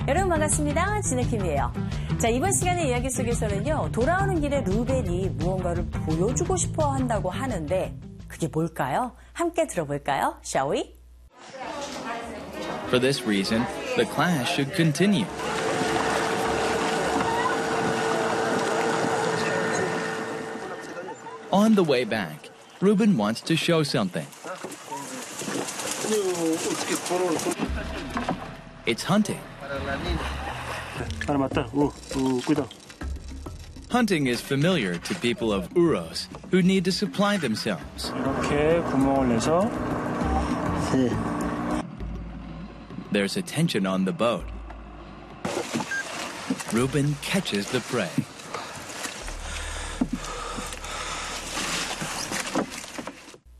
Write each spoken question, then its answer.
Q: 돌아오는 길에 루벤이 무언가를 보여주고 싶어 한다고 하는데 그게 뭘까요?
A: It's hunting. 사냥을 보여주길 원한 모양이에요.